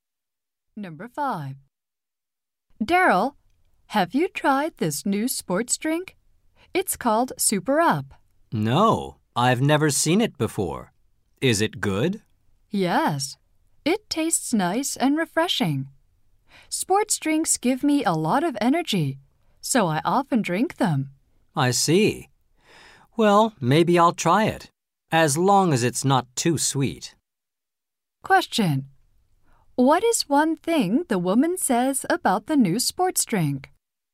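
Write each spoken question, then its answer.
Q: What is one thing the woman says about the new sports drink?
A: It tastes nice and refreshing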